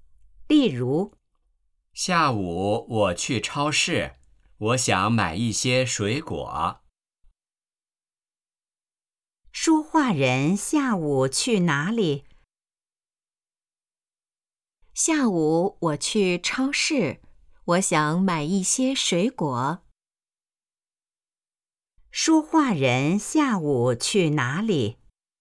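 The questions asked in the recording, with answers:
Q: 说话人下午去哪里?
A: 超市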